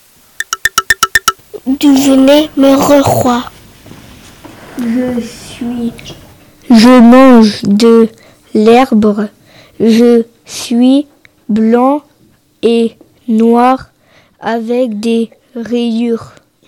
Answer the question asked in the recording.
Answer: Je suis le zèbre.